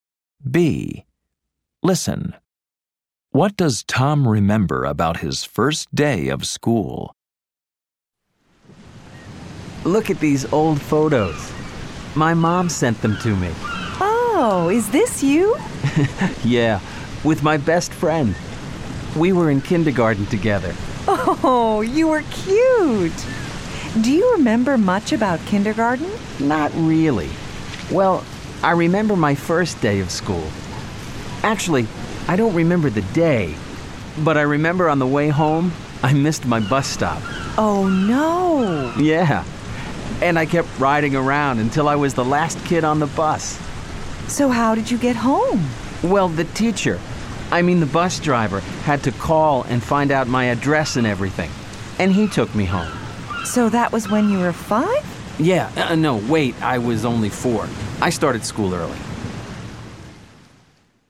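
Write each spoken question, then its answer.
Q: What does Tom remember about his first day of school?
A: He missed his bus stop on the way home and the bus driver took him home.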